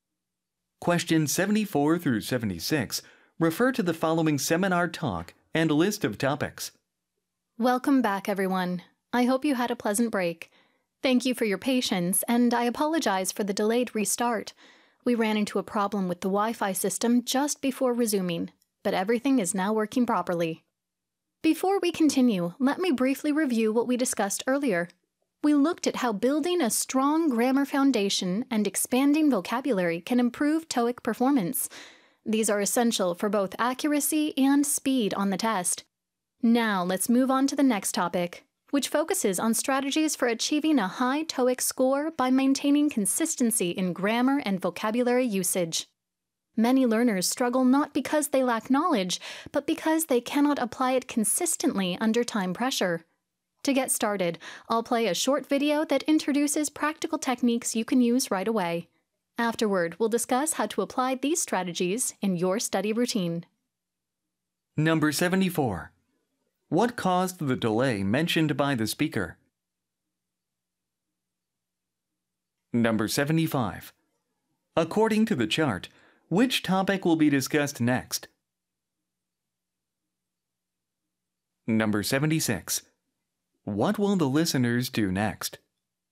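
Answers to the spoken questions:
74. A problem with the Wi-Fi system
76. Watch a short video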